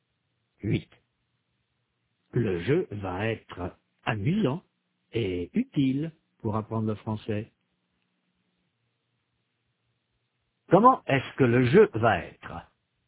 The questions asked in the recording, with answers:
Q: Comment est-ce que le jeu va être?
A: Amusant et utile. Le jeu va être amusant et utile pour apprendre le français.